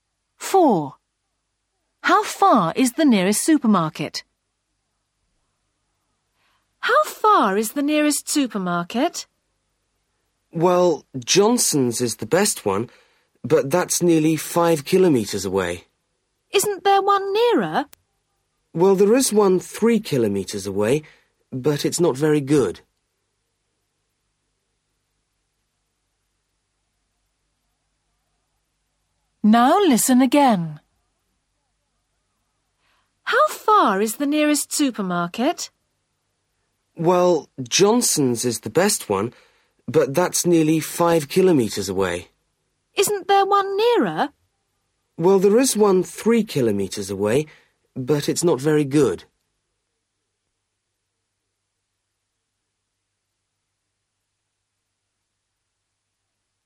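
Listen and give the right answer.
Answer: 3 kilometres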